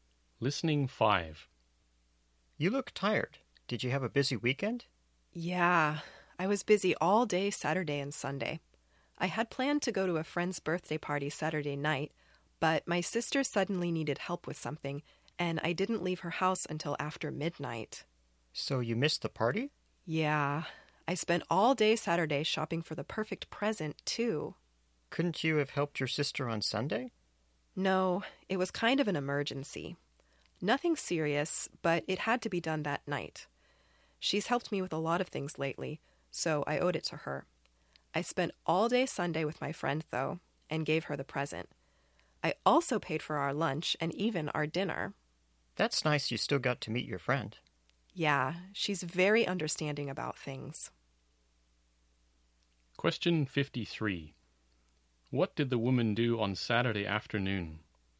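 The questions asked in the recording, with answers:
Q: What did the woman do on Saturday afternoon?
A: She shopped for her friend's birthday present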